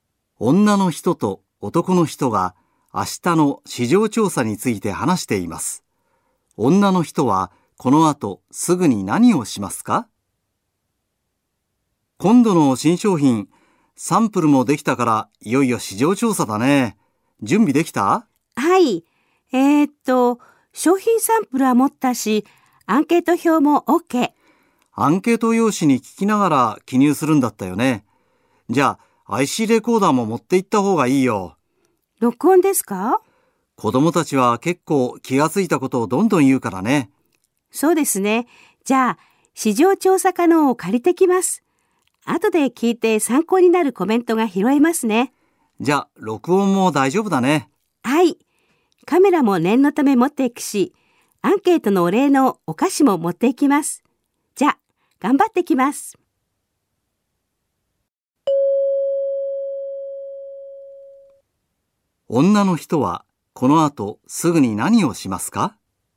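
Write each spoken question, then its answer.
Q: 女の人はこの後すぐに何をしますか?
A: ICレコーダーを借りに行く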